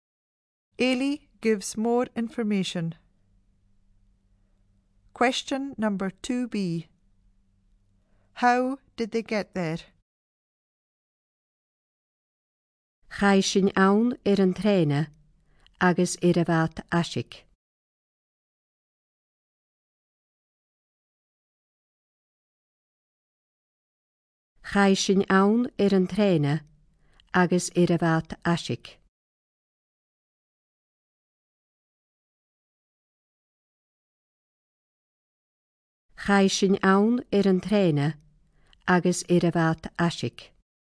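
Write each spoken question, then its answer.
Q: How did they get there?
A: By train and by boat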